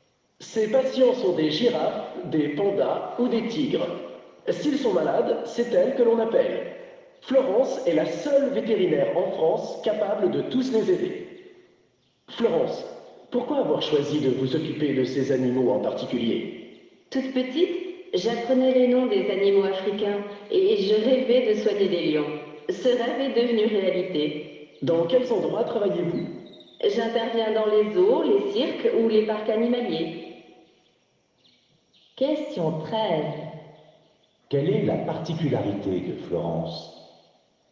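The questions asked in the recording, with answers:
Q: Quelle est la particularité de Florence ?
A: Elle est la seule vétérinaire en France capable de soigner tous ces animaux sauvages (girafes, pandas, tigres).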